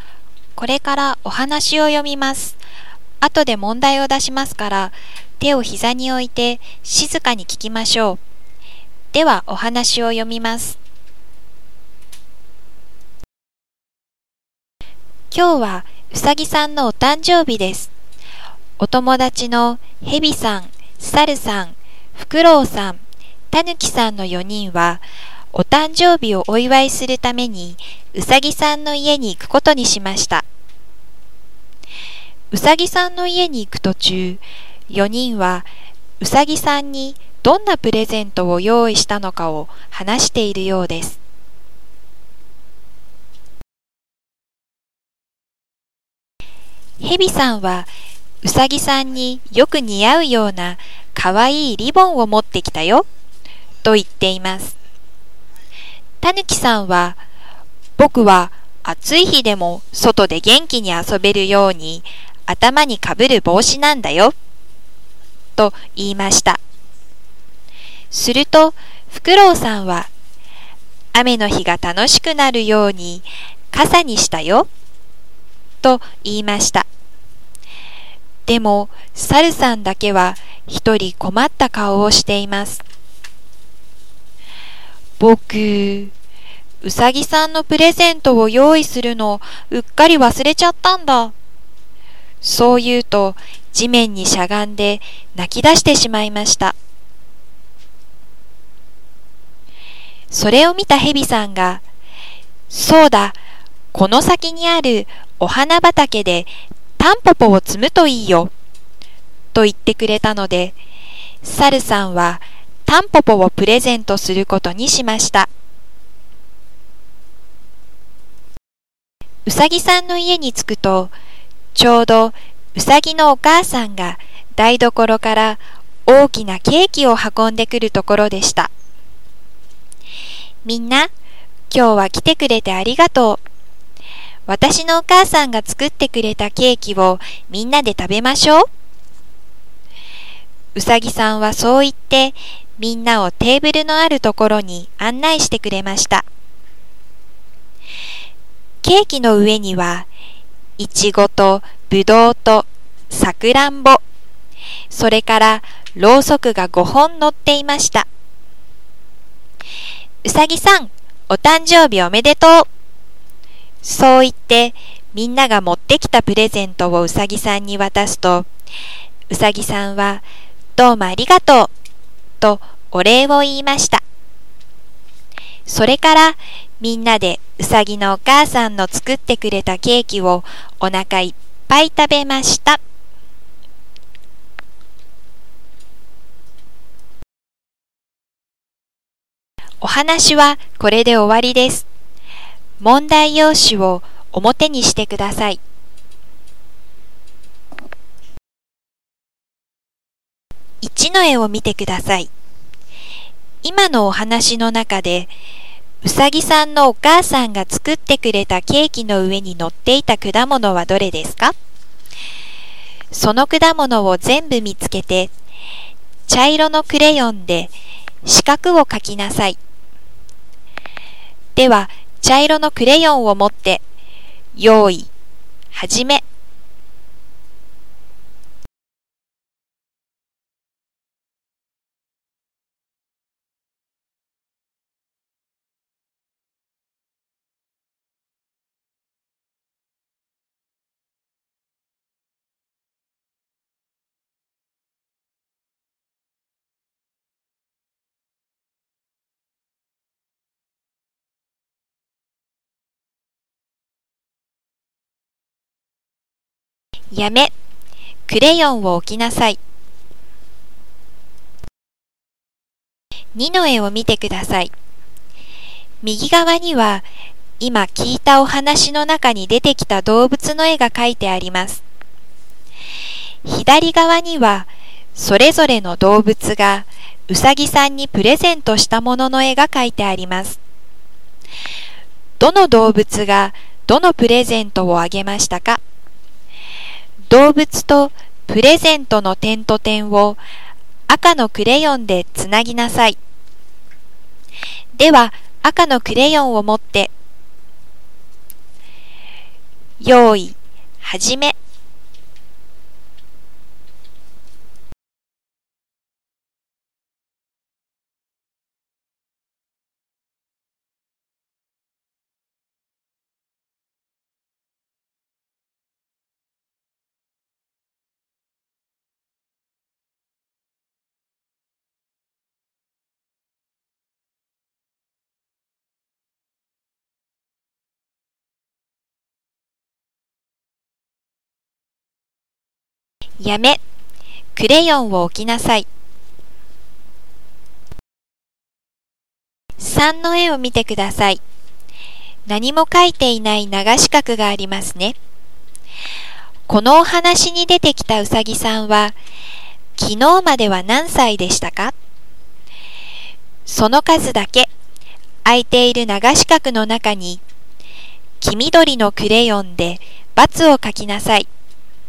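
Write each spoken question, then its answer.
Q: 今のお話の中で、うさぎさんのお母さんが作ってくれたケーキの上に乗っていた果物はどれですか?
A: いちご、ぶどう、さくらんぼ

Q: どの動物がどのプレゼントをあげましたか?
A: ヘビ:リボン、タヌキ:帽子、フクロウ:傘、サル:タンポポ

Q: このお話に出てきたうさぎさんは昨日までは何歳でしたか?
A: 4歳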